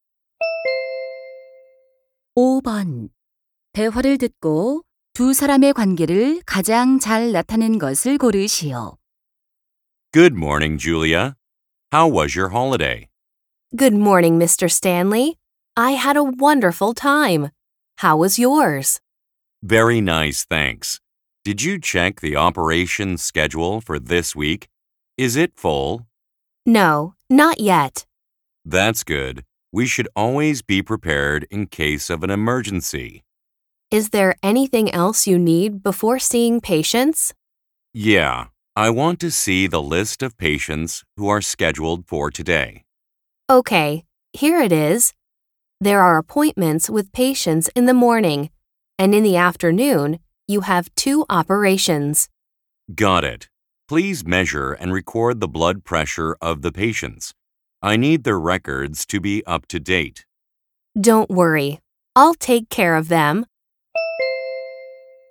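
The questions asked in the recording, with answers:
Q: 대화를 듣고 두 사람의 관계를 가장 잘 나타낸 것을 고르시오.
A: 의사 - 간호사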